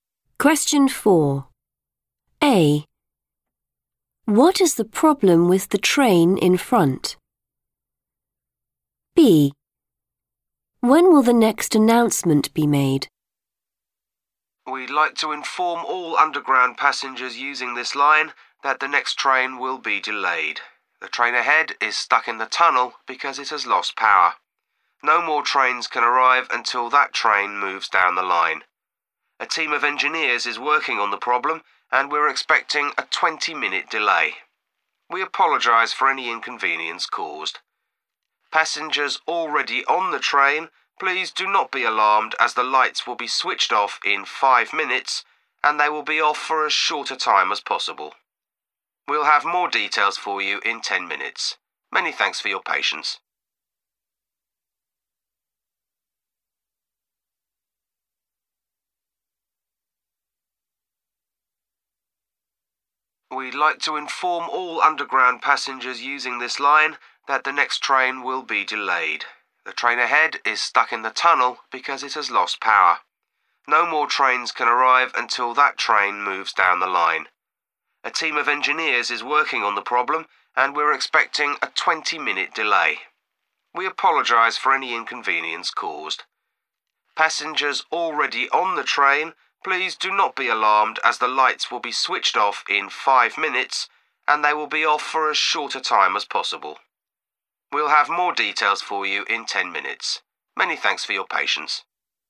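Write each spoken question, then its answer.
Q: What is the problem with the train in front?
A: it has lost power

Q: When will the next announcement be made?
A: in 10 minutes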